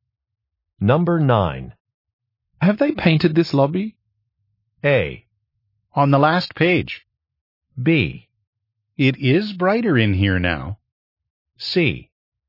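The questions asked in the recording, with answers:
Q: Have they painted this lobby?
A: B: It is brighter in here now.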